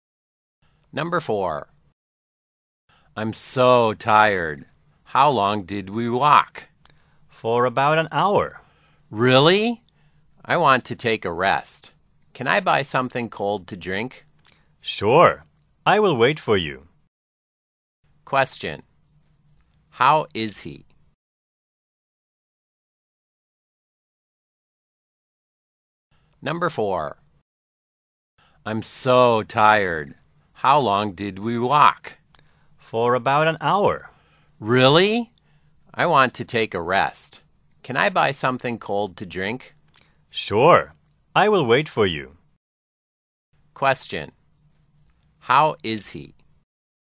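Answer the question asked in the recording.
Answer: He is tired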